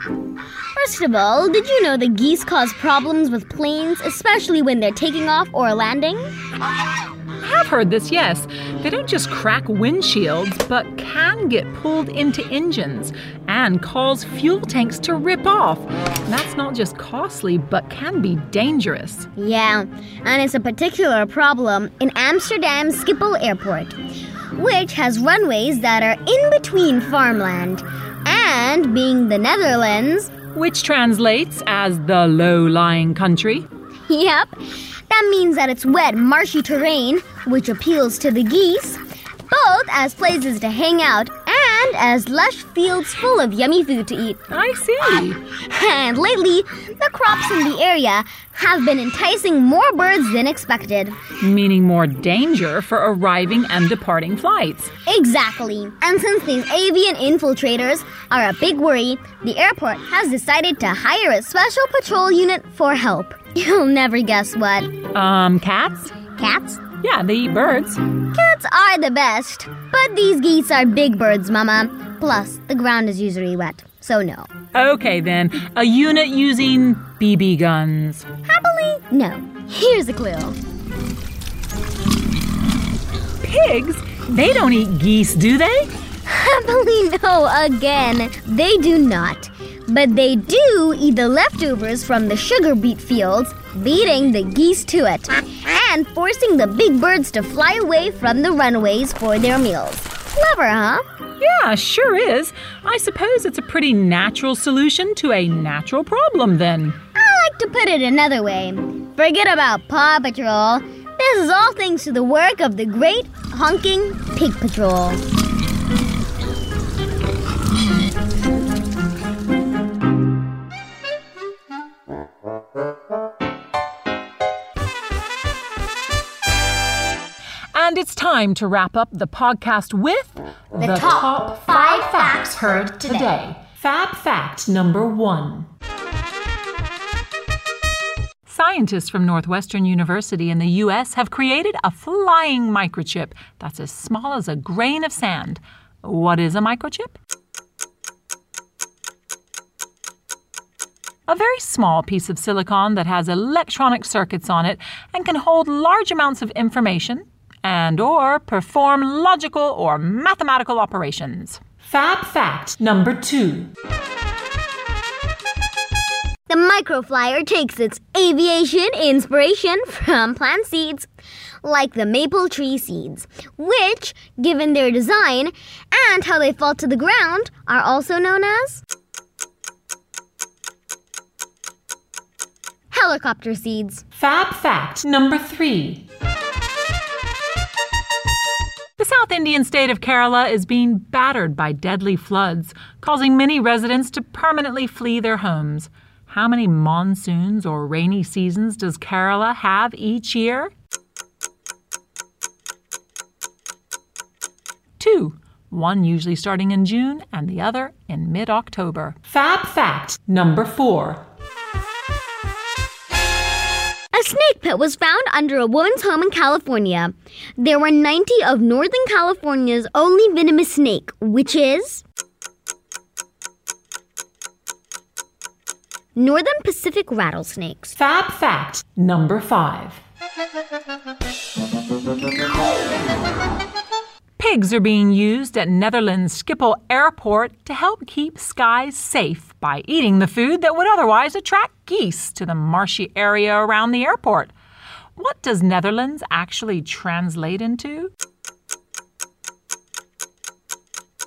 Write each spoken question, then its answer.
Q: What does Netherlands actually translate into?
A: Low-lying country.